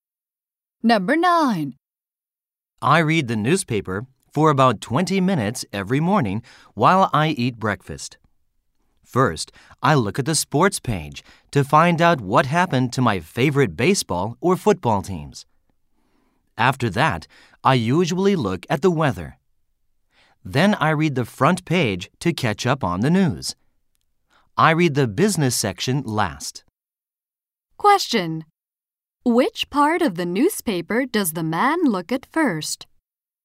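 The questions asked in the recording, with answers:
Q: Which part of the newspaper does the man look at first?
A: The sports page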